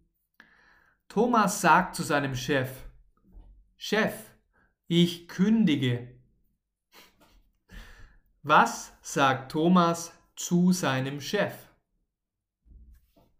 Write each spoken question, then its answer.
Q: Was sagt Thomas zu seinem Chef?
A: Er sagt Chef, ich kündige.